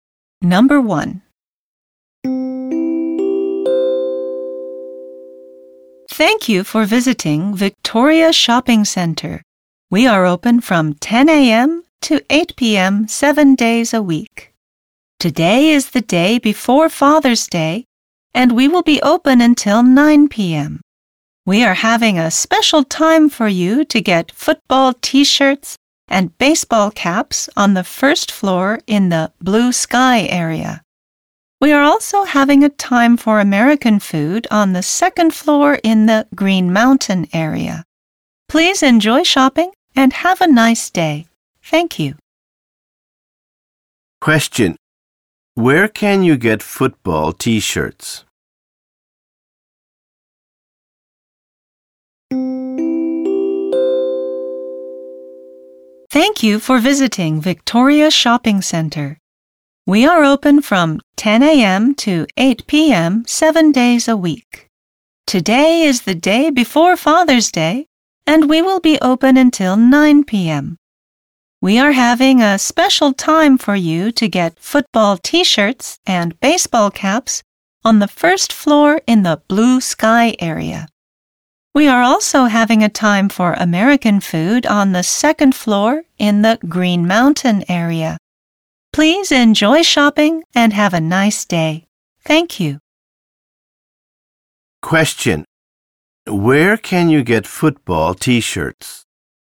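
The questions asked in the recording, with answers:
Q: Where can you get football t-shirts?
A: On the first floor in the blue sky area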